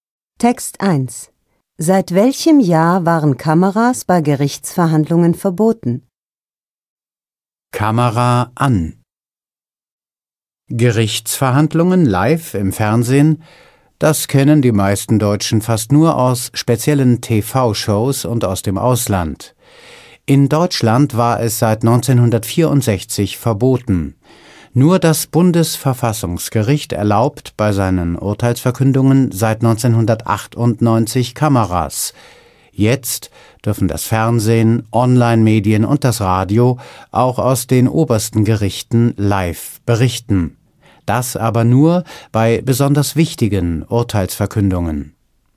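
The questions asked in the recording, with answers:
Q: Seit welchem Jahr waren Kameras bei Gerichtsverhandlungen verboten?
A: Seit 1964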